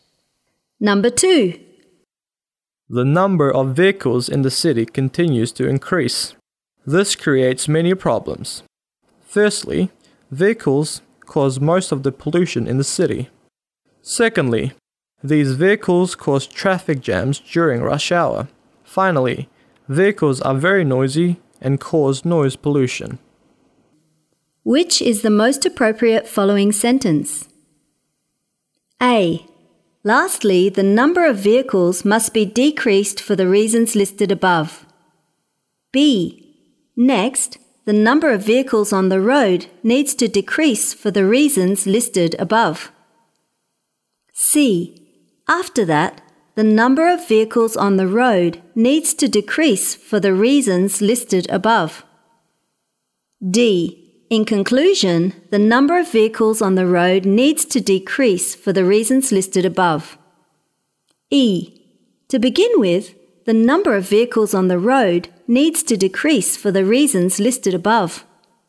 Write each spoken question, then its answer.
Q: Which is the most appropriate following sentence?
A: D. In conclusion, the number of vehicles on the road needs to decrease for the reasons listed above.